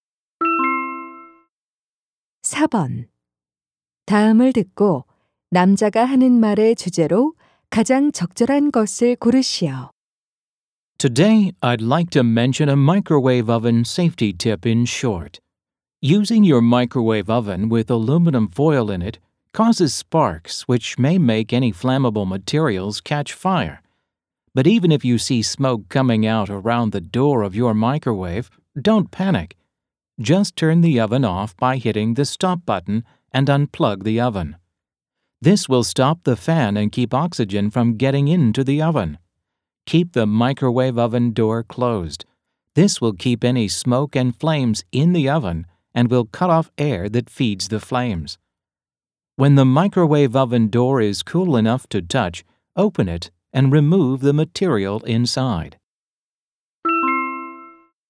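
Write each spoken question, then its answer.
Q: 다음을 듣고 남자가 하는 말의 주제로 가장 적절한 것을 고르시오.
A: 전자레인지 화재 시 대처 요령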